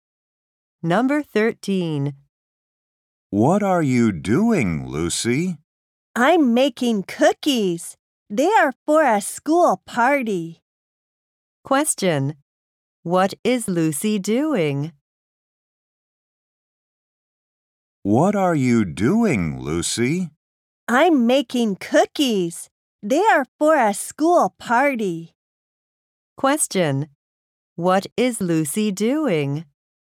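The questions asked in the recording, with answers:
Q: What is Lucy doing?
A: Making cookies.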